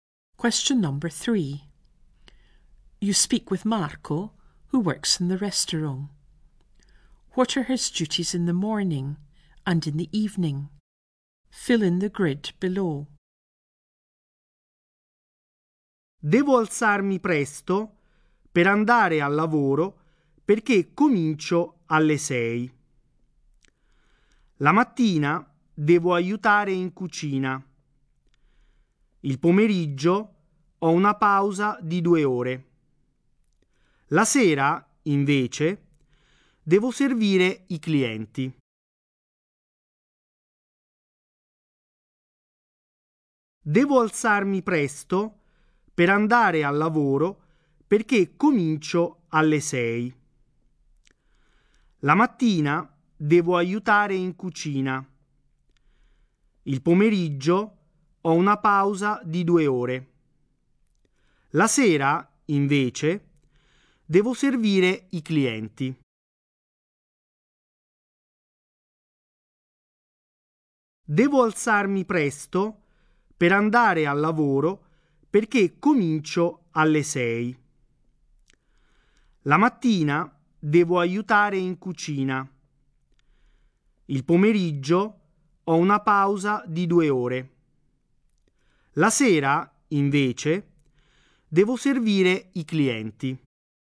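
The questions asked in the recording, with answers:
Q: What are his duties in the morning and in the evening?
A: Morning: help in the kitchen; evening: serve customers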